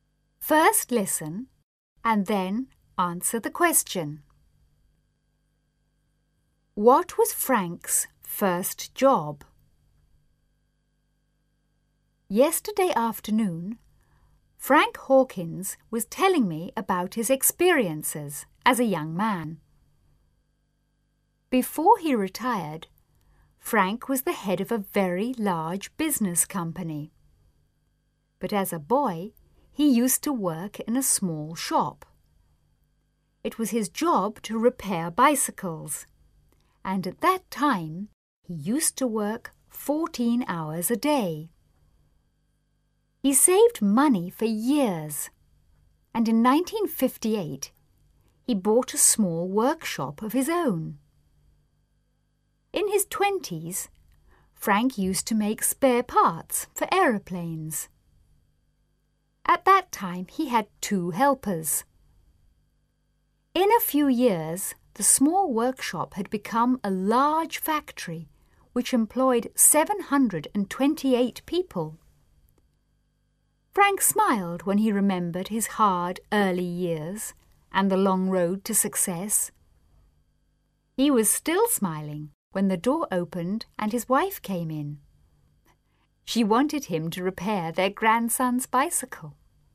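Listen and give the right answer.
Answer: He repaired bicycles in a small shop.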